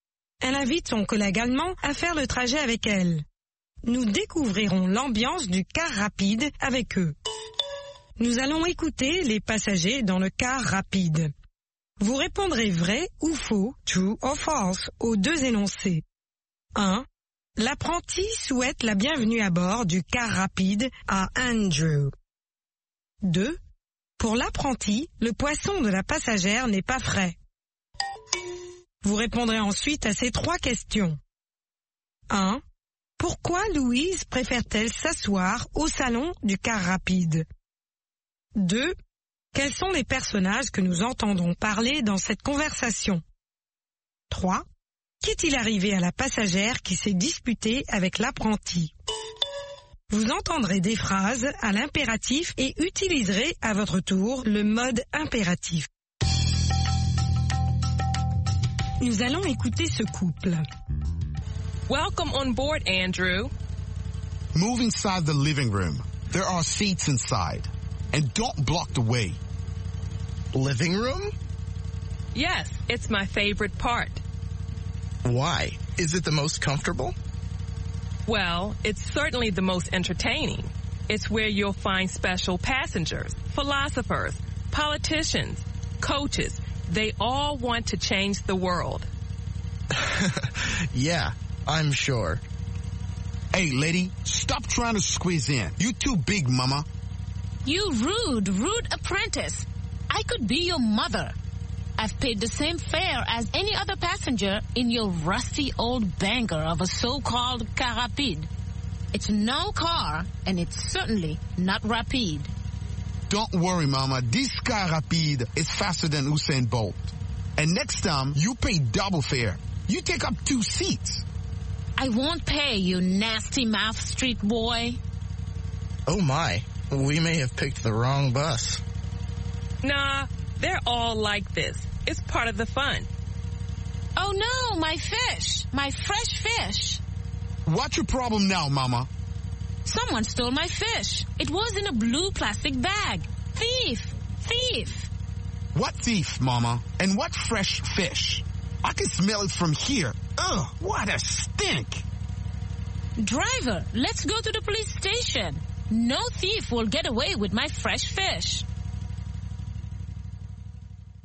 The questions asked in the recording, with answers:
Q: Pour l'apprenti, le poisson de la passagère n'est pas frais.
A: L'énoncé 2 est vrai.

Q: Pourquoi Louise préfère-t-elle s'asseoir au salon du car rapide?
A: C'est son endroit préféré.

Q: Quels sont les personnages que nous entendrons parler dans cette conversation?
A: Louise, Andrew, l'apprenti et la passagère.

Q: Qu'est-il arrivé à la passagère qui s'est disputée avec l'apprenti?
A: Quelqu'un est descendu avec son poisson frais.